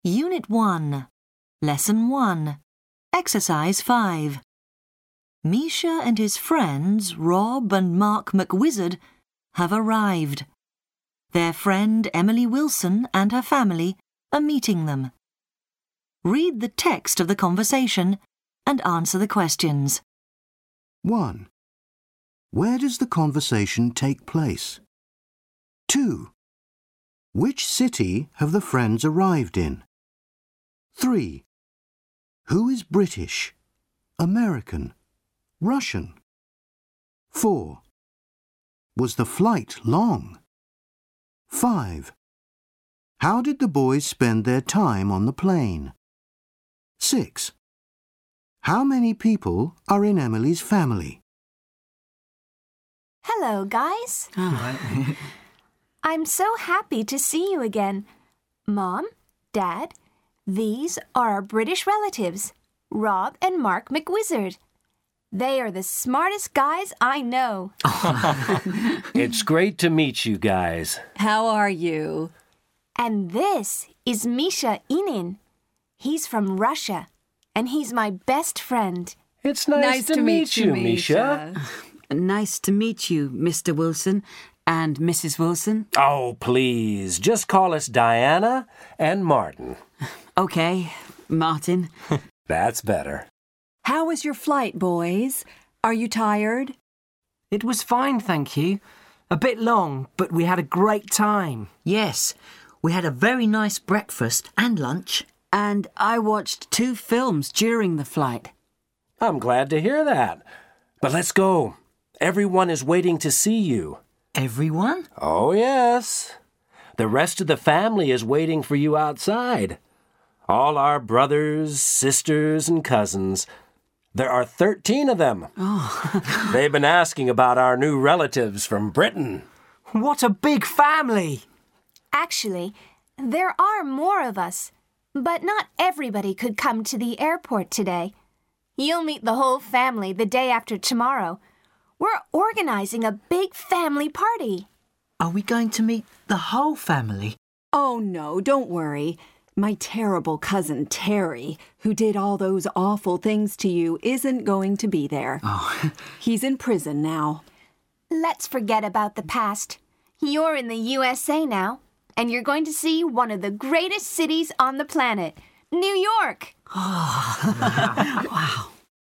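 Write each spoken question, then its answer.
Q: Where does the conversation take place?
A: At the airport

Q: Which city have the friends arrived in?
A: New York

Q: Who is British, American, Russian?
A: Rob and Mark are British, Emily and her family are American, Misha is Russian

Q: Was the flight long?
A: A bit long

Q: How did the boys spend their time on the plane?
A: They had breakfast and lunch and watched films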